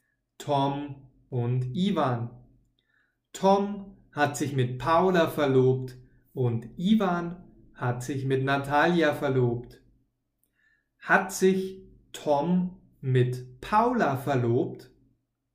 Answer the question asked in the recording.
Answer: Ja, das stimmt. Tom ist jetzt mit Paula verlobt.